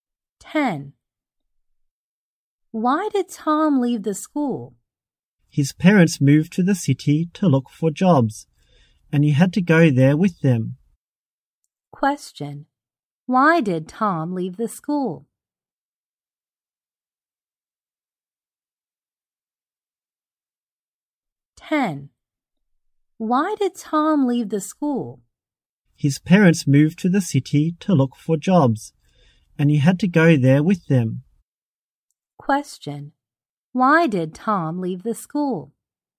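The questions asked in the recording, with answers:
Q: Why did Tom leave the school?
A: His parents moved to the city to look for jobs and he had to go with them.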